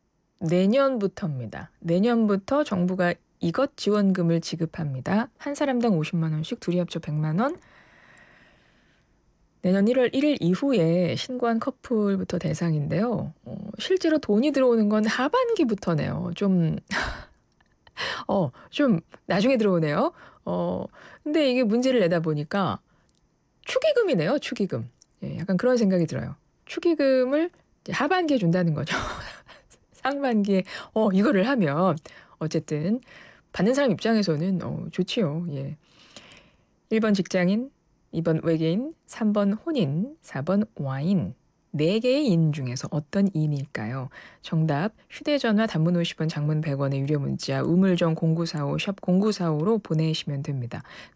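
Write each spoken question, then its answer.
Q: 4개의 인 중에서 어떤 인일까요?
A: 3번: 혼인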